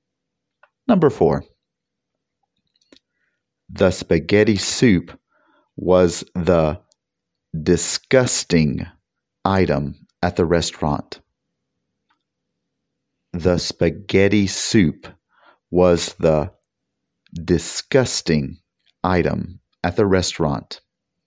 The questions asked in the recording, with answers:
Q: The spaghetti soup was the disgusting item at the restaurant.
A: Did you say most disgusting?